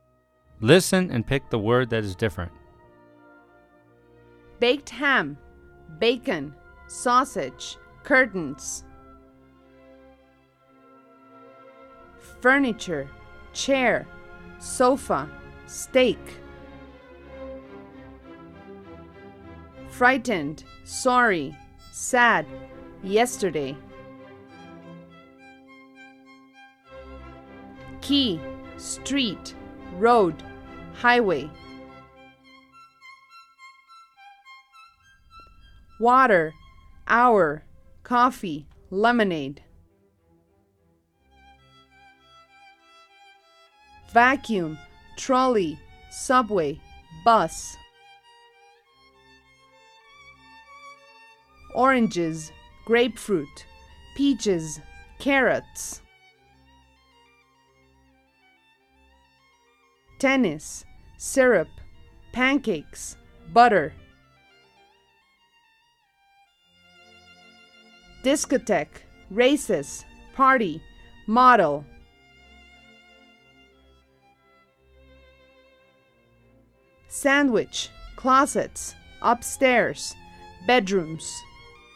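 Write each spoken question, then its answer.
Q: Baked ham, bacon, sausage, curtains.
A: curtains

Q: Furniture, chair, sofa, steak.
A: steak

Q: Frightened, sorry, sad, yesterday.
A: yesterday

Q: Key, street, road, highway.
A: key

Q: Water, hour, coffee, lemonade.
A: hour

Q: Vacuum, trolley, subway, bus.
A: vacuum

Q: Oranges, grapefruit, peaches, carrots.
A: carrots

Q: Tennis, syrup, pancakes, butter.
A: tennis

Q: Sandwich, closets, upstairs, bedrooms.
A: sandwich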